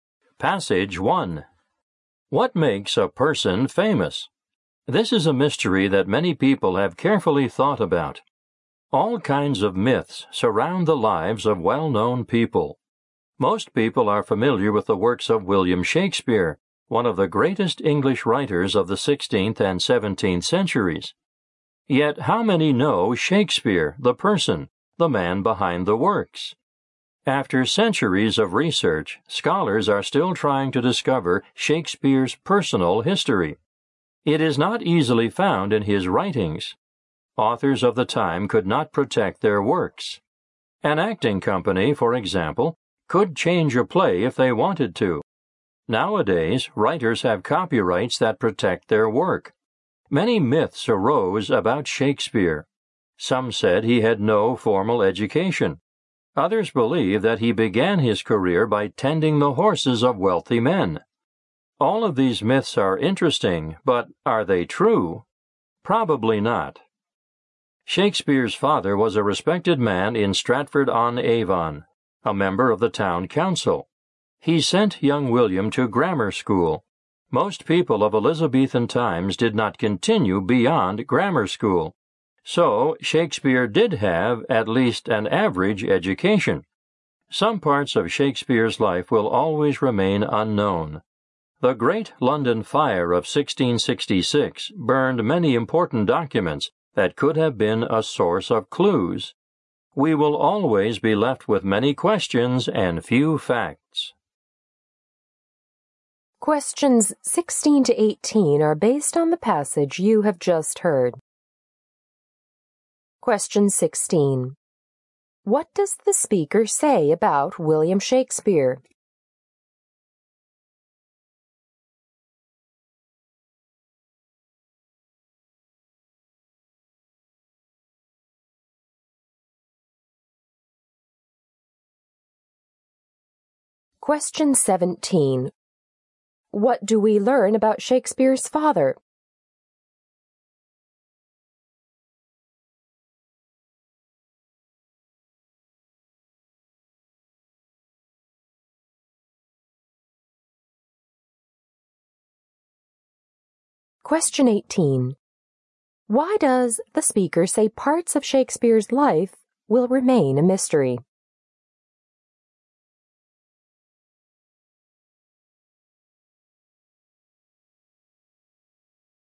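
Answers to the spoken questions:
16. Little is known about his personal life.
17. He was a respected man and a member of the town council.
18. Many important documents were burned in the Great London Fire of 1666.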